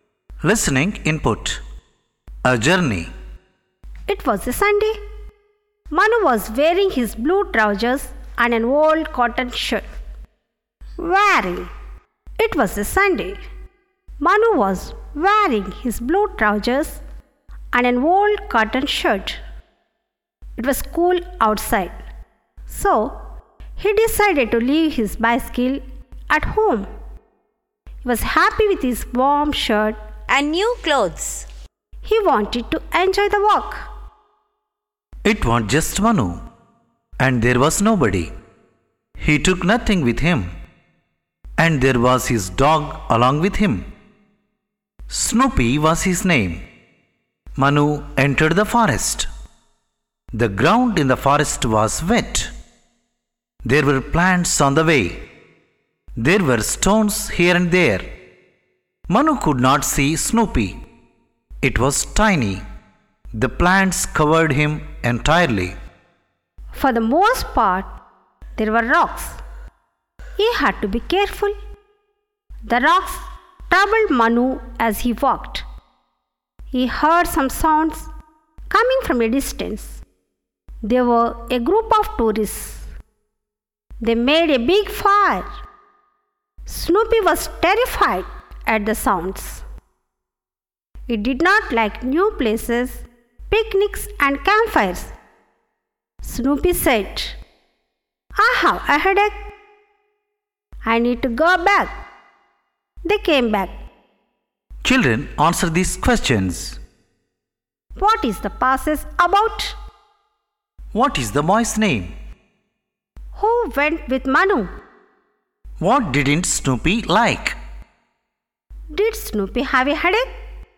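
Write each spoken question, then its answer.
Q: What is the boy's name?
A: Manu

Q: Who went with Manu?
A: His dog, Snoopy

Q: What didn't Snoopy like?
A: New places, picnics and campfires

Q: Did Snoopy have a headache?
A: Yes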